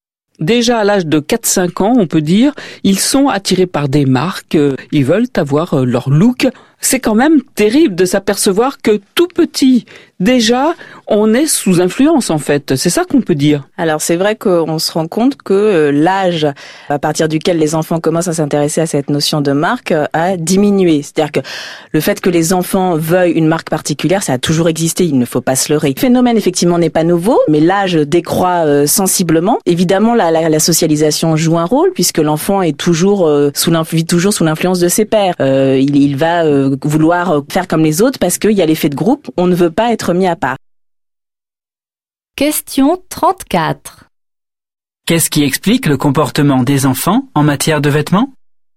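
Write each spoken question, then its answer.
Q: Qu'est-ce qui explique le comportement des enfants en matière de vêtements ?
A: La socialisation : l'influence des pairs et l'effet de groupe (ils veulent faire comme les autres)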